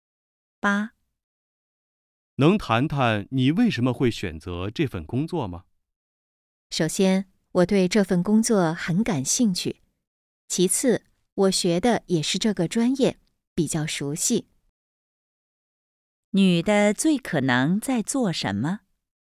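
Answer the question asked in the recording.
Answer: 面试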